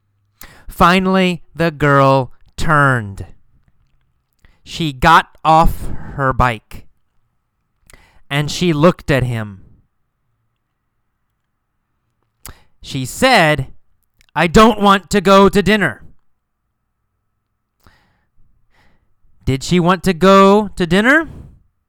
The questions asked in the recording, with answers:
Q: Did she want to go to dinner?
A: No.